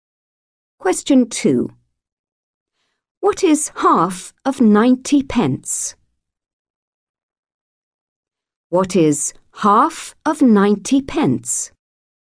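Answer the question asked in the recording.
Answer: 45 pence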